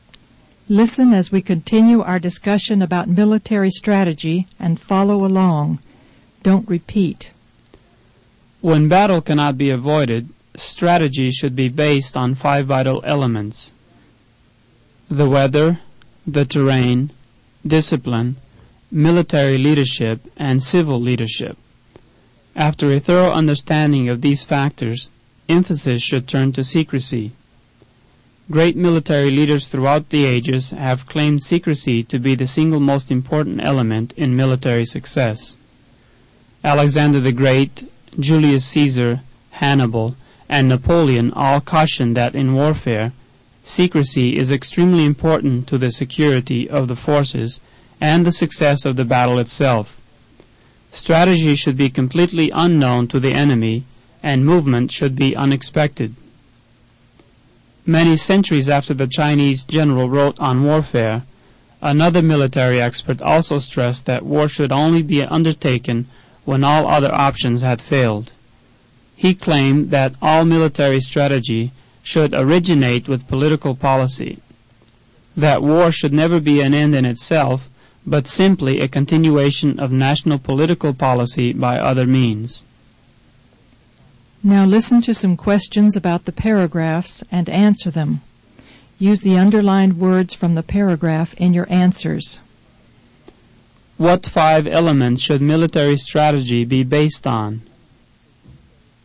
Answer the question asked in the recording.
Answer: Strategy should be based on the weather, the terrain, discipline, military leadership, and civil leadership.